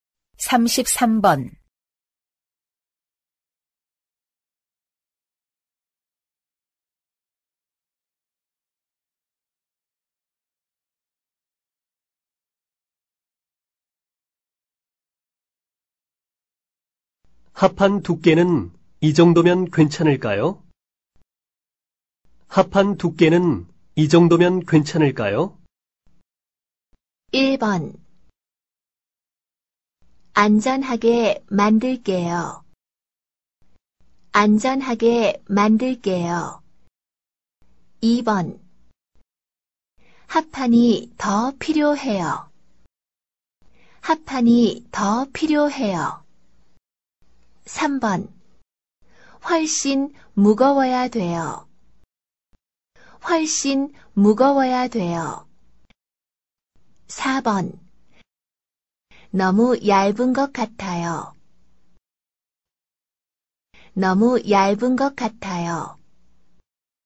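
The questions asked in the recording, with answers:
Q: 합판 두께는 이 정도면 괜찮을까요?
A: 4: 너무 얇은 것 같아요.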